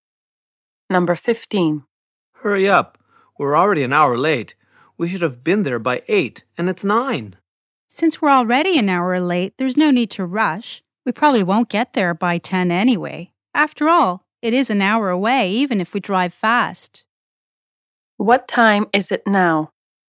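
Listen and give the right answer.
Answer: 9 o'clock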